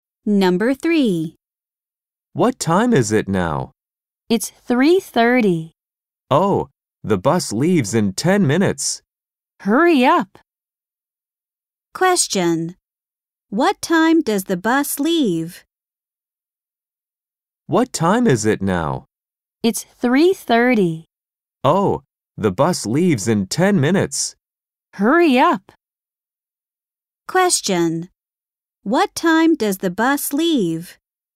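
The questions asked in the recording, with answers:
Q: What time does the bus leave?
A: 3:40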